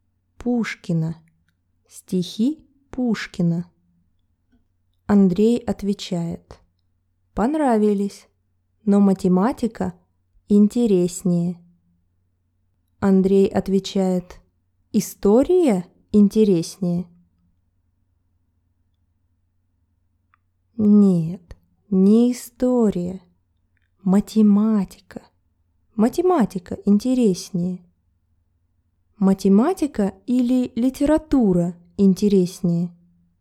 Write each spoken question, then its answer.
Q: Математика или литература интереснее?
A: Математика интереснее.